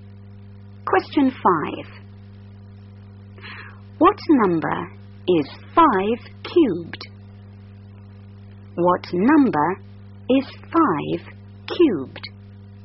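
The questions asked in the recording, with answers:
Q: What number is 5 cubed?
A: 125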